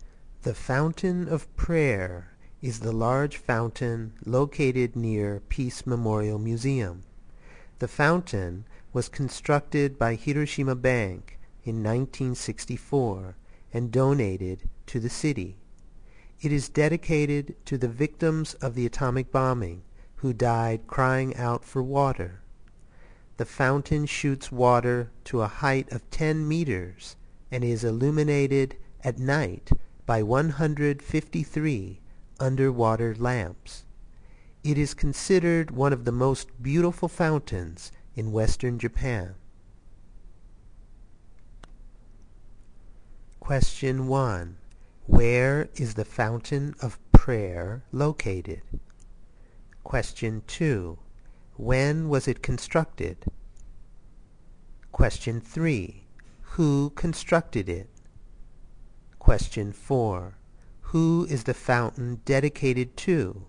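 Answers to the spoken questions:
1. Near Peace Memorial Museum
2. In 1964
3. Hiroshima Bank
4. The victims of the atomic bombing who died crying out for water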